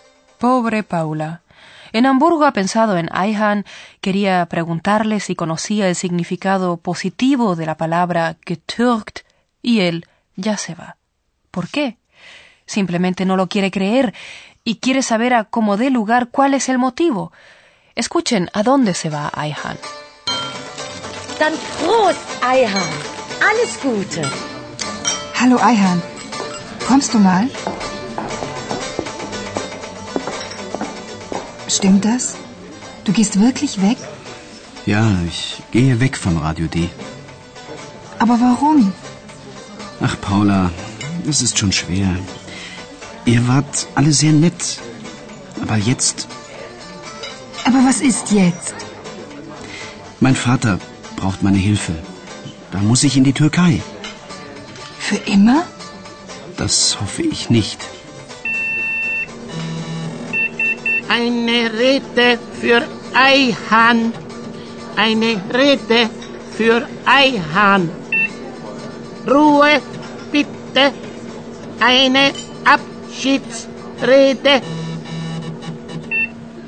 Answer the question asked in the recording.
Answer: Con seguridad han escuchado que Ayhan debe volver donde su padre, a Turquía.